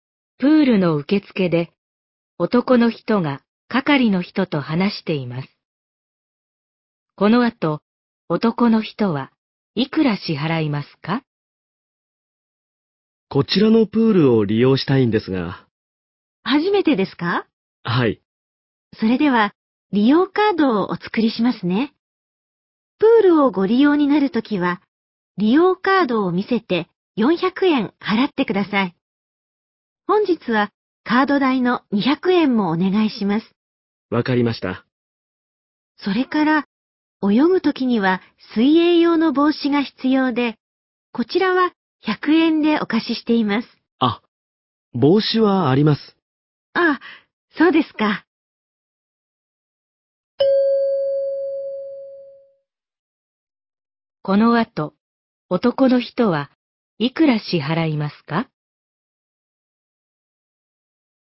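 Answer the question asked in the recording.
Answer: 600円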